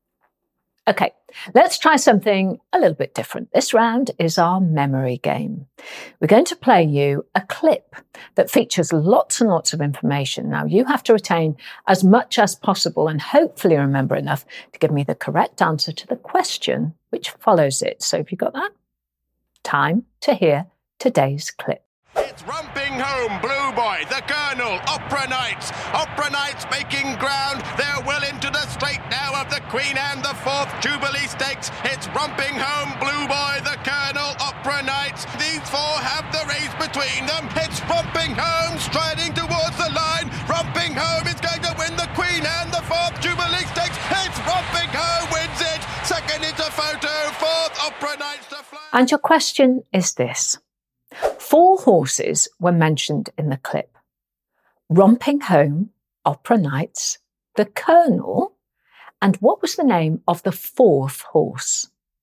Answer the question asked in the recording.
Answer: And the answer was Blue Boy.